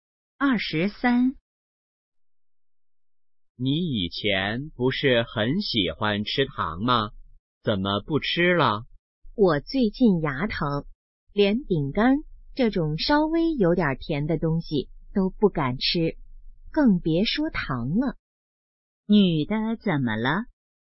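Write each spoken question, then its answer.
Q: 女的怎么了?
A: 牙疼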